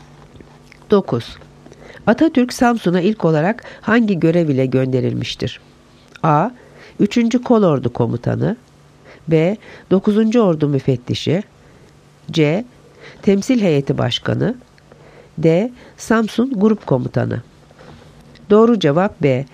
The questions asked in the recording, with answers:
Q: Atatürk Samsun'a ilk olarak hangi görev ile gönderilmiştir?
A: Doğru cevap B. 9. Ordu Müfettişi.